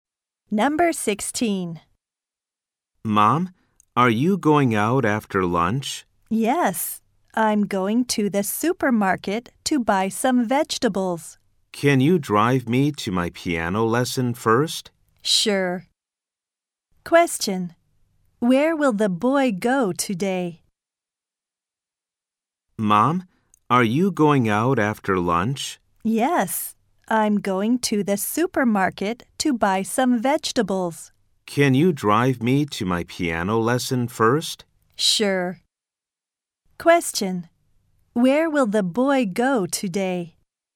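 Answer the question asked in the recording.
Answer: To his piano lesson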